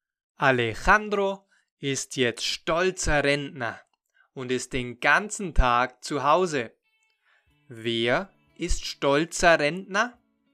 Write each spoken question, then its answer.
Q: Wer ist stolzer Rentner?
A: Alejandro, er ist jetzt stolzer Rentner.